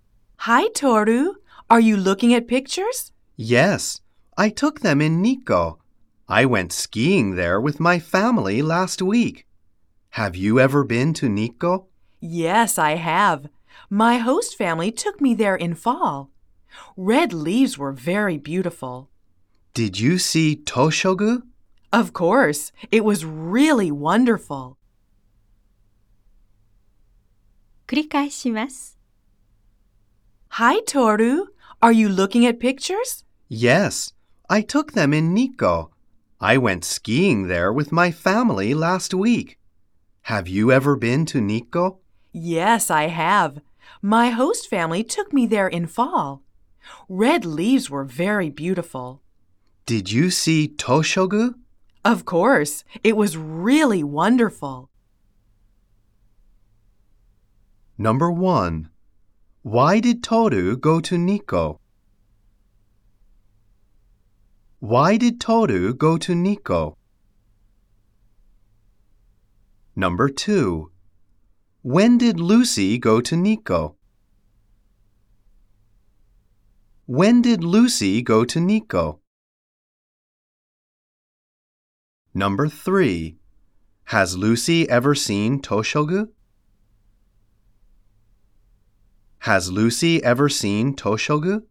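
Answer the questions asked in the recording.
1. To go skiing with his family.
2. In fall.
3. Yes, she has.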